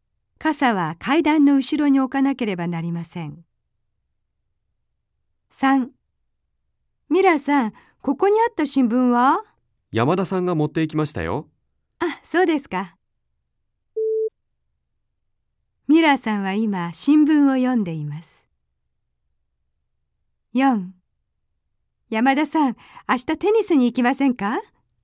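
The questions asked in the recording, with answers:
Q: ミラーさんは今、新聞を読んでいます。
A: ×(正しくない)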